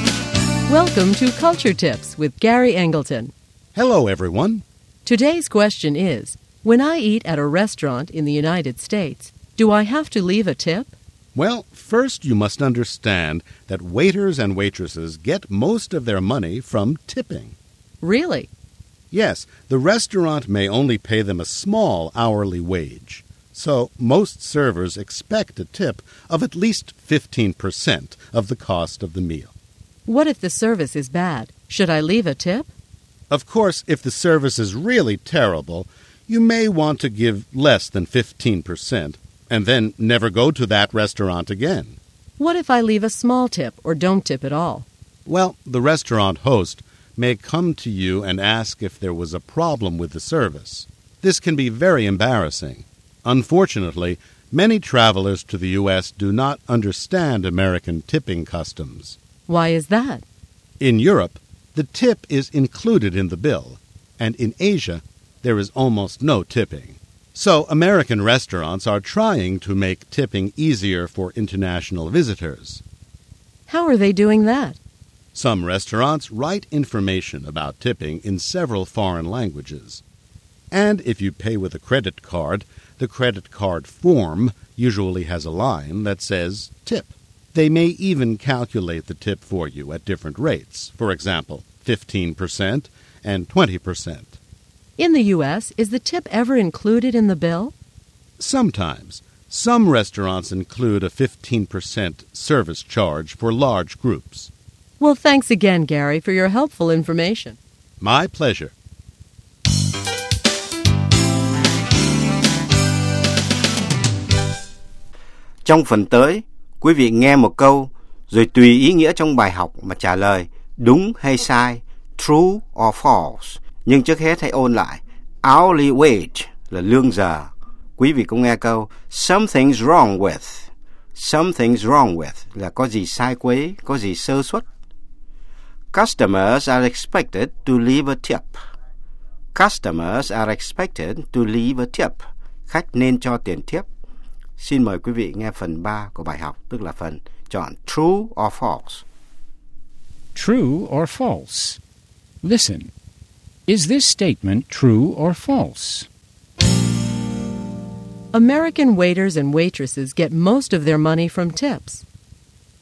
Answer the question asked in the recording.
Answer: True. The restaurant may only pay them a small hourly wage.